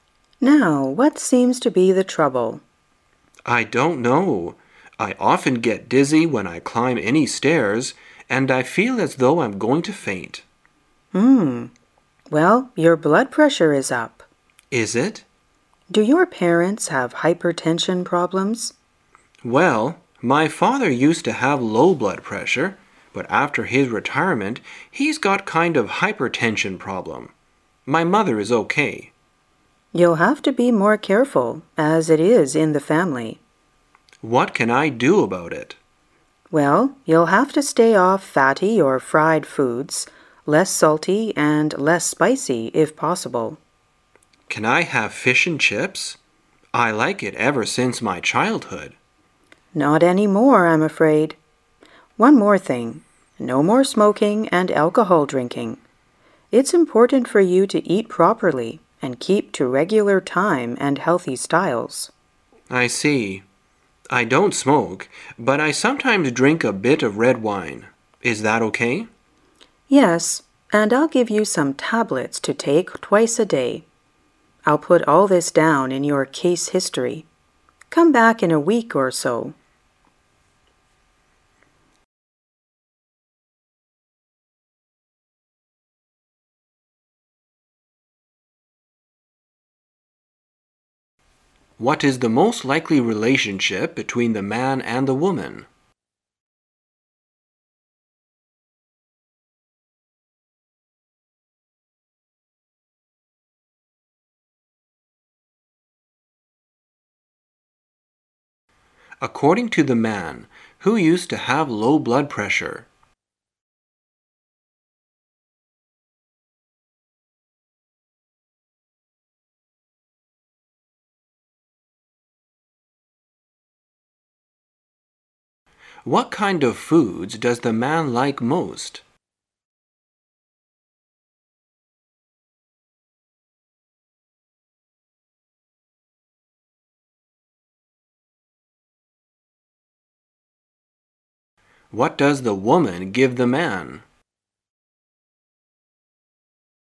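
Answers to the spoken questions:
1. Doctor and patient
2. His father
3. Fish and chips
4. Some tablets

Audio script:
[解析] 11-14 W: Now, what seems to be the trouble? M: I don't know. I often get dizzy when I climb any stairs and I feel as though I'm going to faint. Well, your blood pressure is up. M: Is it? W: Do your parents have hypertension problems? M: Well, my father used to have low blood pressure, but after his retirement, he's got kind of hypertension problem. My mother is OK. W: You'll have to be more careful, as it is in the family. M: What can I do about it? W: Well, you'll have to stay off fatty or fried foods, less salty and less spicy, if possible. M: Can I have fish and chips. I like it ever since my childhood. W: Not any more, I'm afraid. One more thing, no more smoking and alcohol drinking. It's important for you to eat properly and keep to regular time and healthy styles. 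M: I see. I don't smoke, but I sometimes drink a bit red wine. Is that OK? W: Yes, and I'll give you some tablets to take twice a day. I'll put all this down in your case history. Come back in a week or so.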